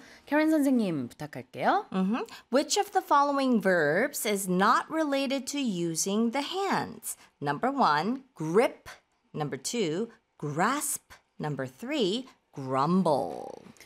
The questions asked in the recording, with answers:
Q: Which of the following verbs is not related to using the hands?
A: Grumble.